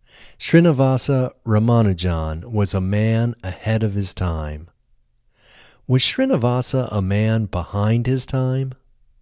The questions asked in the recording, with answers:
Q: Was Srinivasa a man behind his time?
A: No, Srinivasa wasn't a man behind his time.